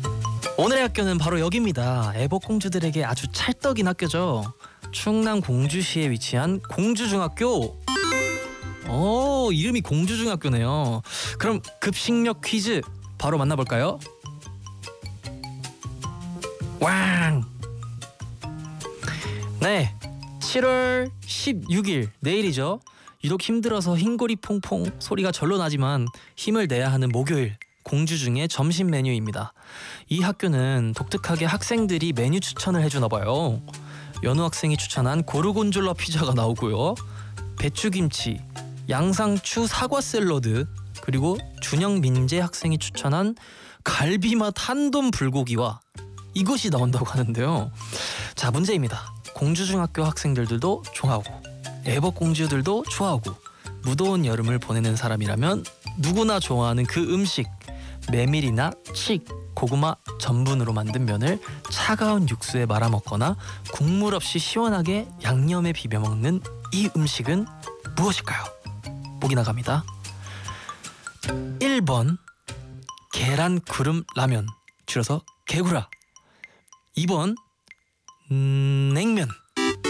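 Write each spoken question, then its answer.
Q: 메밀이나 칡, 고구마 전분으로 만든 면을 차가운 육수에 말아먹거나 국물 없이 시원하게 양념에 비벼먹는 이 음식은 무엇일까요?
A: 2: 냉면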